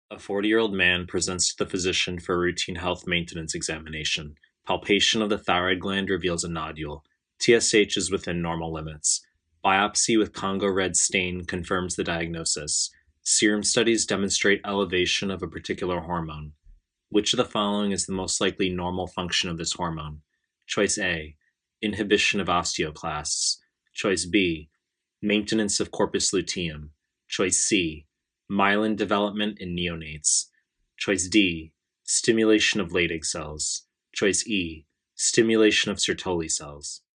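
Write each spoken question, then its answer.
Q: Which of the following is the most likely normal function of this hormone?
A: A: inhibition of osteoclasts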